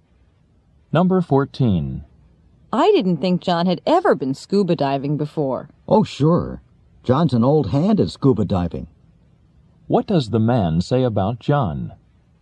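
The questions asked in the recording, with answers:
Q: What does the man say about John?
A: John is an experienced scuba diver.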